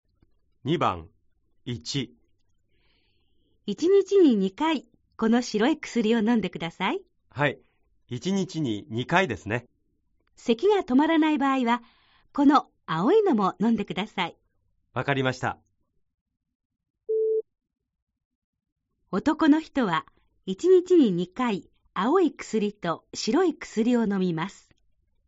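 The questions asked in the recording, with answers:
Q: 男の人は1日に2回青い薬と白い薬を飲みます。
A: ×(間違い)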